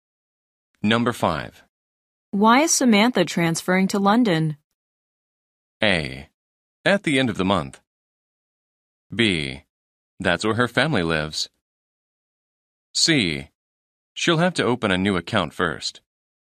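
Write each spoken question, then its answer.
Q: Why is Samantha transferring to London?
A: B: That's where her family lives.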